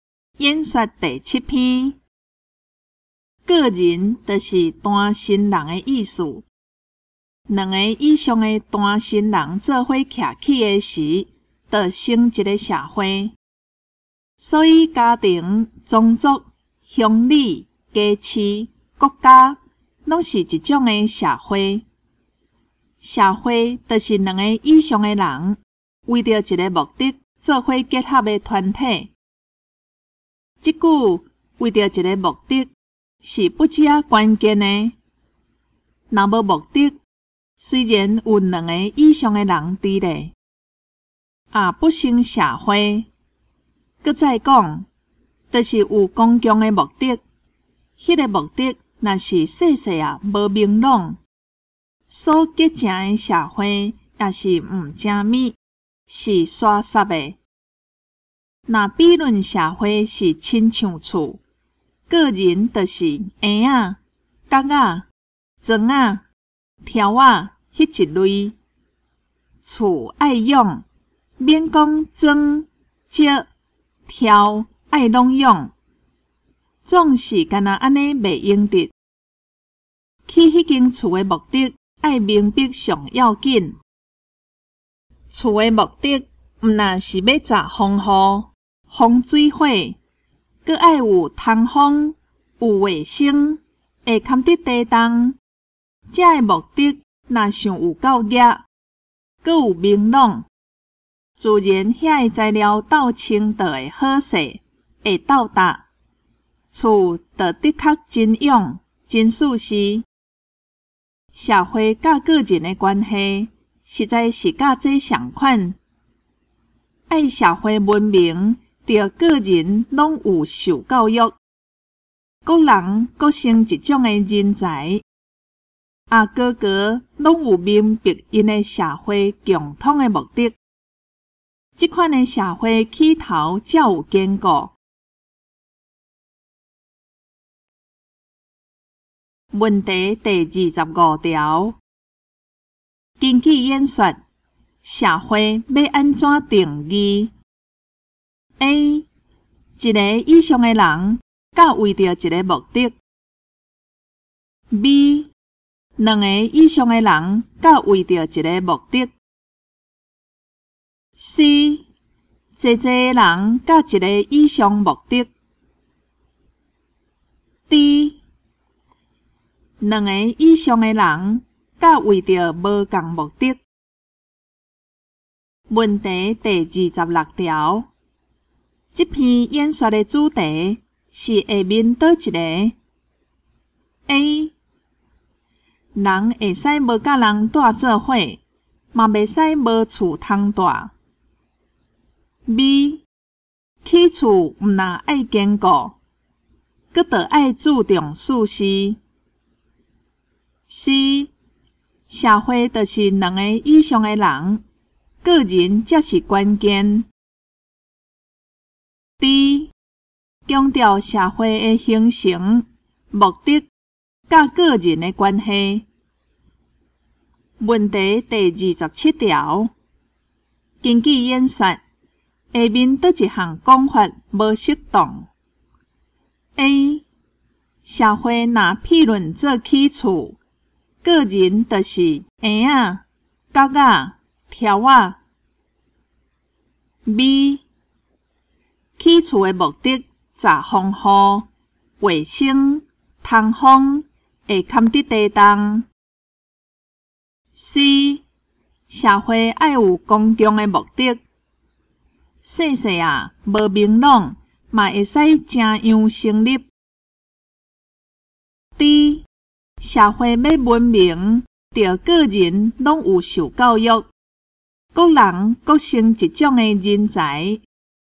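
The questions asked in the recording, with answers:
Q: 根据演说,社会要安怎定义?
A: B: 两个以上的人甲为着一个目的。

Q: 这篇演说的主题是下面哪一个?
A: D: 强调社会的形成、目的和个人的关系。

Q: 根据演说,下面哪一项讲法无适当?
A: C: 社会爱有公共的目的,细细啊,无明朗,嘛会使正样成立。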